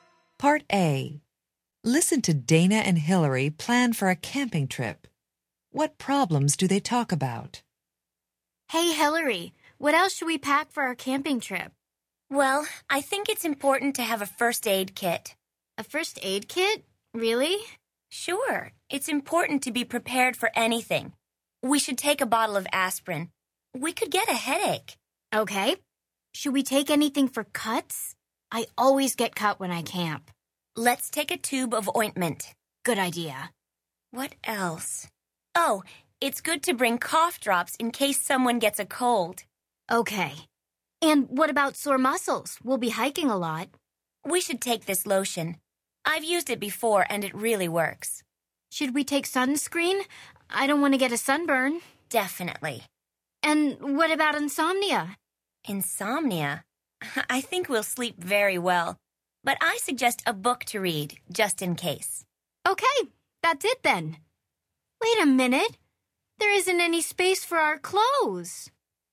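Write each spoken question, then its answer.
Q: What problems do they talk about?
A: Headache, cuts, a cold, sore muscles, sunburn and insomnia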